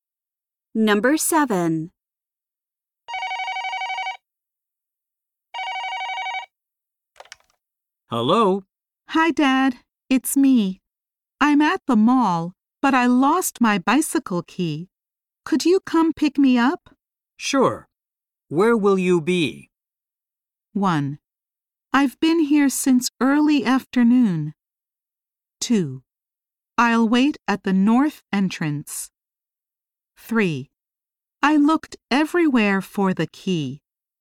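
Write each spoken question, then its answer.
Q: Sure. Where will you be?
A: 2: I'll wait at the north entrance.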